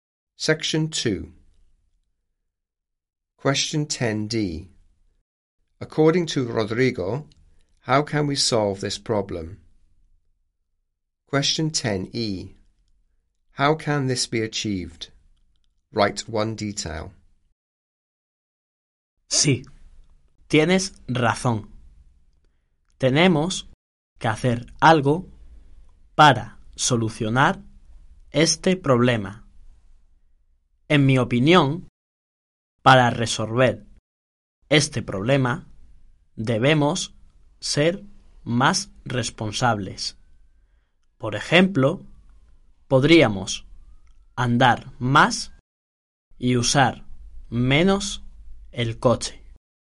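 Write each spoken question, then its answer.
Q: According to Rodrigo, how can we solve this problem?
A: By being more responsible

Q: How can this be achieved?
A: Walking more / using the car less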